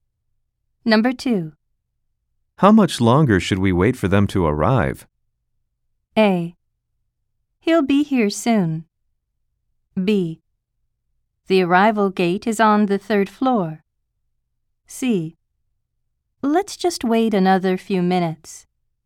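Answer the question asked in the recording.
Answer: C: Let's just wait another few minutes.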